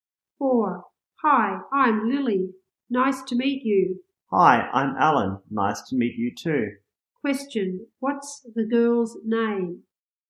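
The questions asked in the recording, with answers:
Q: What's the girl's name?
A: Lily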